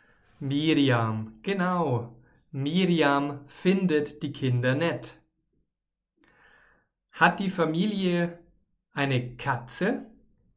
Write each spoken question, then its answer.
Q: Hat die Familie eine Katze?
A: Nein, nein, die Familie hat natürlich keine Katze, sondern einen Hund.